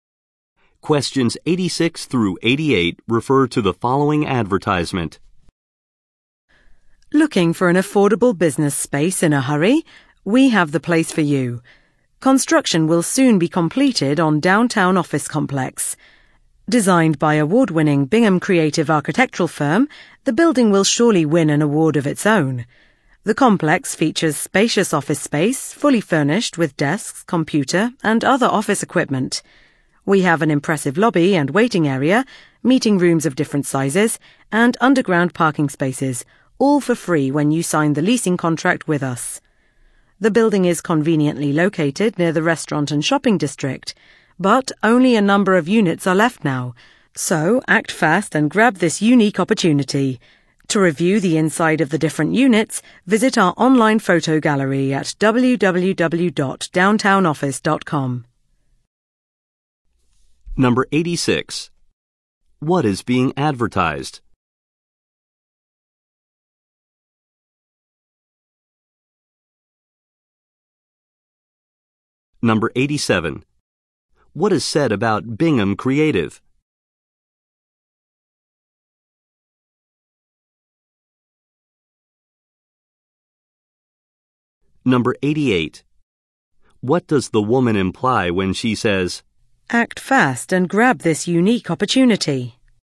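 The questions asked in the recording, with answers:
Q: What is being advertised?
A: Office space in a downtown office complex

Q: What is said about Bingham Creative?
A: It is an award-winning firm that designed the building

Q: What does the woman imply when she says,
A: Only a few units are left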